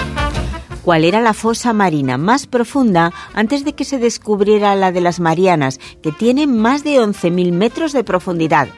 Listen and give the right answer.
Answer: Solución. Pues la fosa de las Marianas ya existía antes de ser descubierta.